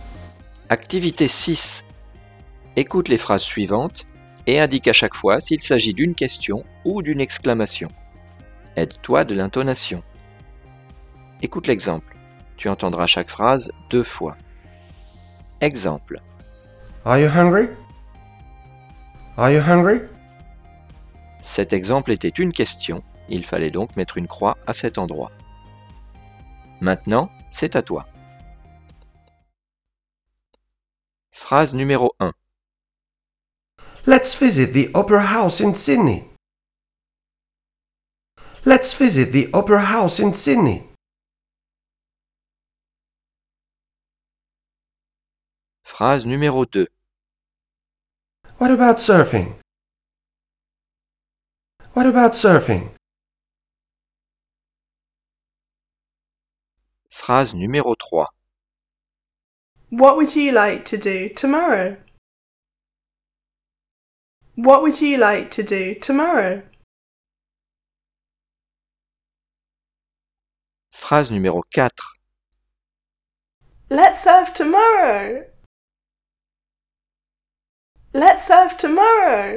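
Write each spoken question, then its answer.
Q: Phrase numéro 1.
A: exclamation

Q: Phrase numéro 3.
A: question

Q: Phrase numéro 4.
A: exclamation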